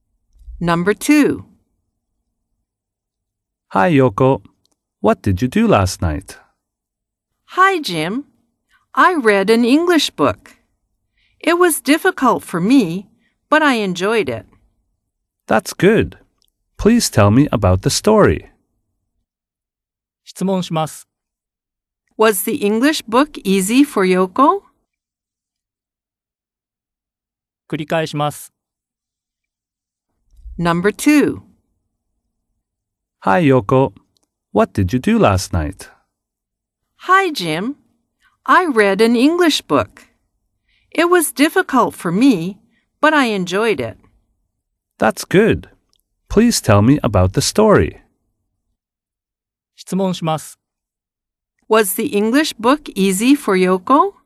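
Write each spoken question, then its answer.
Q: Was the English book easy for Yoko?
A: No, it wasn't. It was difficult.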